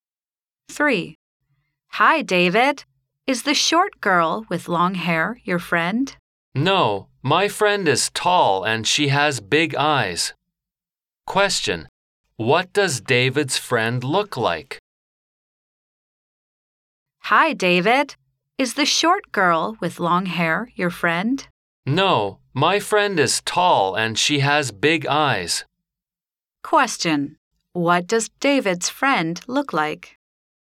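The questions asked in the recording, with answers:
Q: What does David's friend look like?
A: She is tall and has big eyes.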